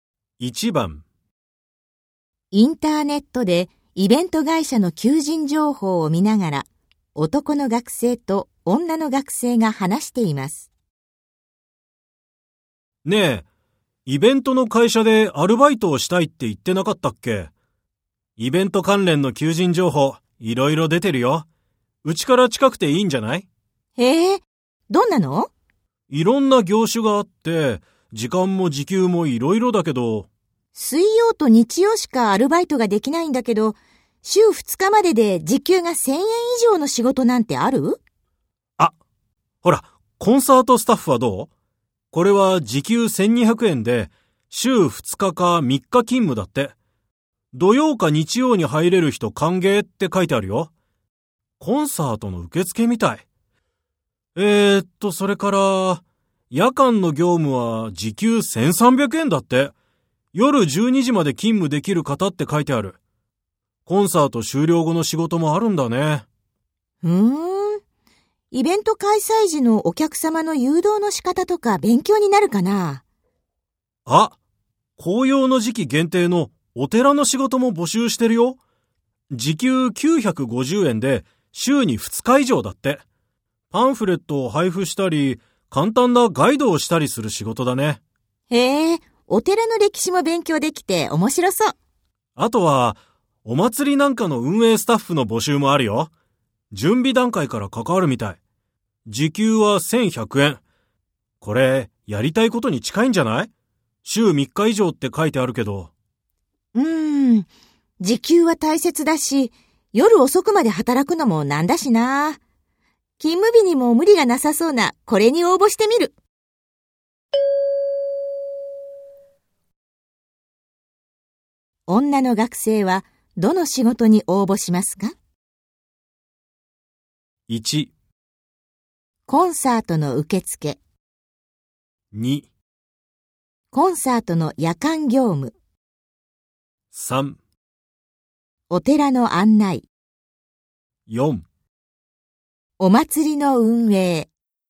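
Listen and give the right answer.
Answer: 1: コンサートの受付。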